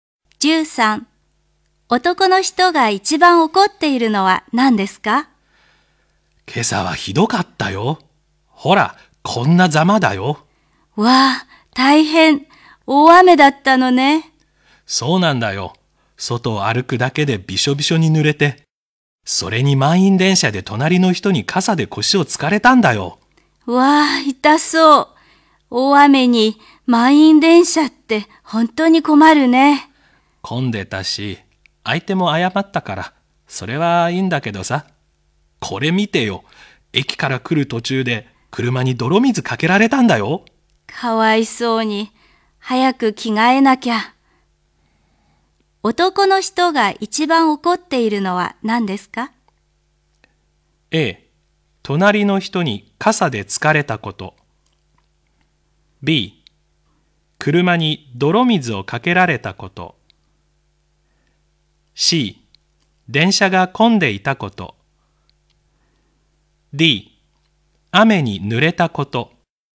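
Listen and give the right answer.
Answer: B: 車に泥水をかけられたこと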